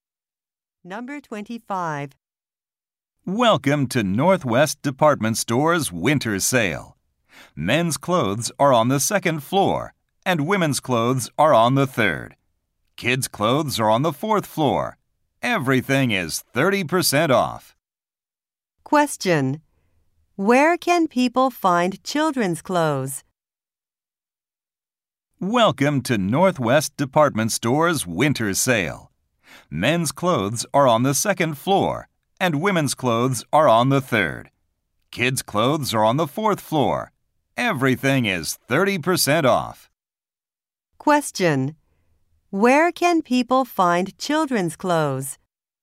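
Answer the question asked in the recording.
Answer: On the fourth floor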